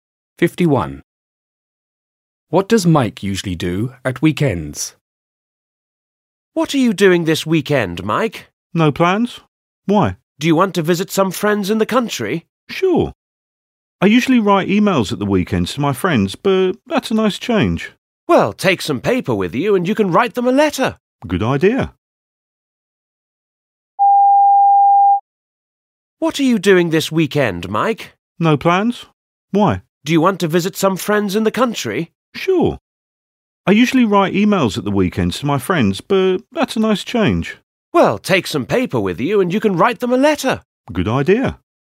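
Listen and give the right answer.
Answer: Writes emails to his friends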